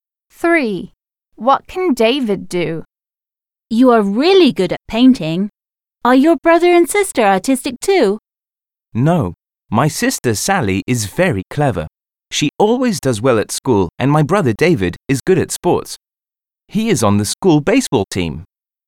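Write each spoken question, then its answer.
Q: What can David do?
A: He is good at sports (plays baseball)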